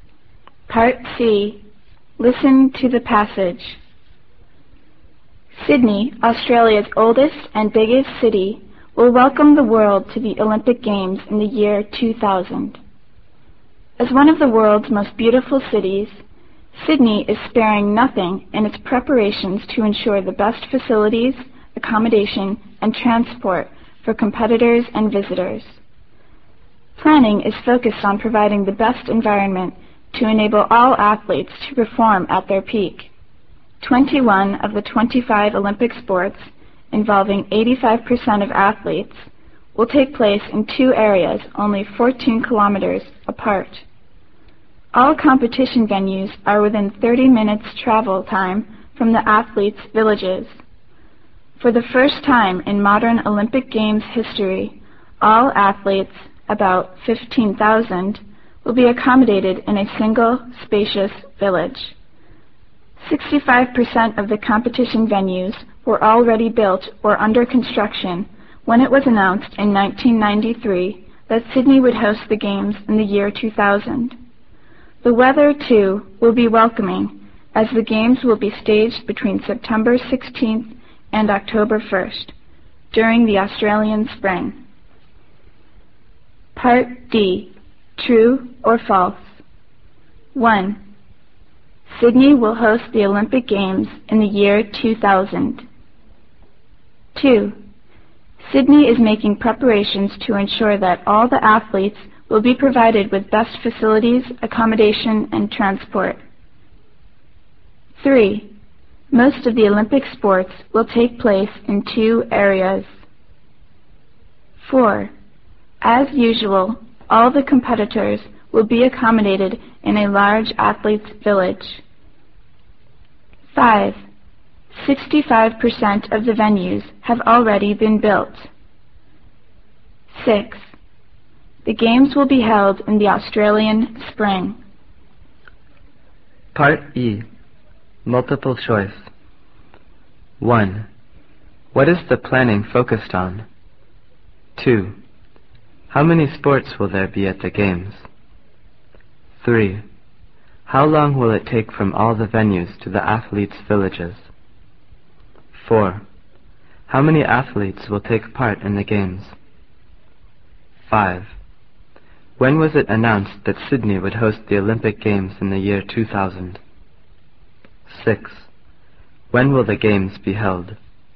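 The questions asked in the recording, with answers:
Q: Sydney will host the Olympic Games in the year 2000.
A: True

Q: Most of the Olympic sports will take place in two areas.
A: True

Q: As usual, all the competitors will be accommodated in a large athletes' village.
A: False

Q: 65% of the venues have already been built.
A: False

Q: The games will be held in the Australian spring.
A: True

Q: What is the planning focused on?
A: Providing the best environment for athletes to perform at their peak

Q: How many sports will there be at the games?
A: 25

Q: How long will it take from all the venues to the athletes' villages?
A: Within 30 minutes

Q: How many athletes will take part in the games?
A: About 15,000

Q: When was it announced that Sydney would host the Olympic Games in the year 2000?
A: In 1993

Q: When will the games be held?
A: September 16th to October 1st, in the Australian spring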